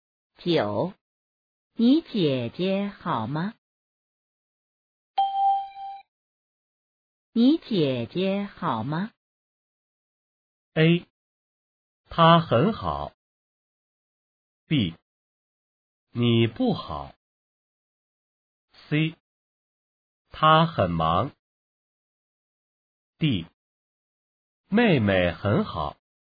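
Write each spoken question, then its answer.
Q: 你姐姐好吗?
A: A: 她很好。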